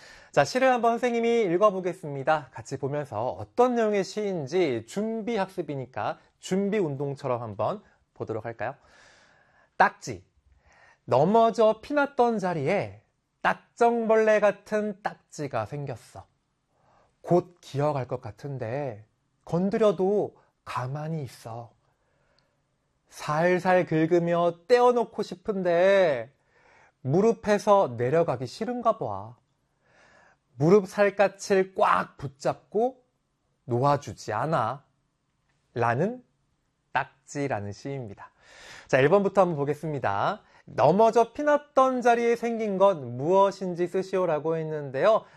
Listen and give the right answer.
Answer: 정답은 딱지라고 적어주면 되겠네요.